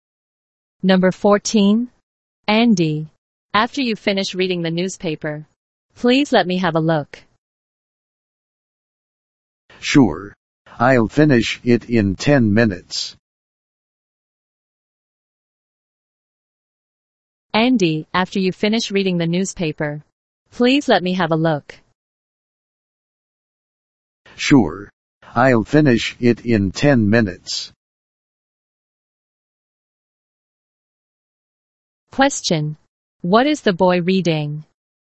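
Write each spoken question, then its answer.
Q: What is the boy reading?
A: The newspaper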